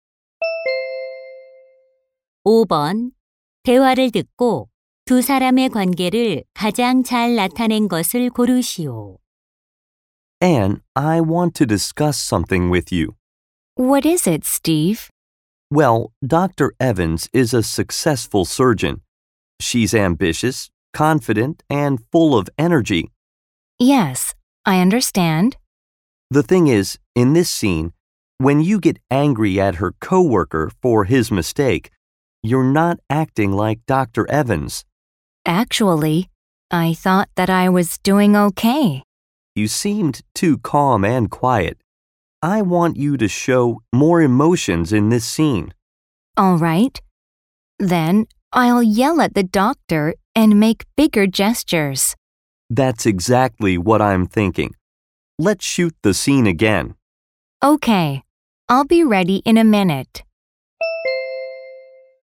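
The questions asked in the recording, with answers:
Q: 대화를 듣고 두 사람의 관계를 가장 잘 나타낸 것을 고르시오.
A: 영화 감독 - 배우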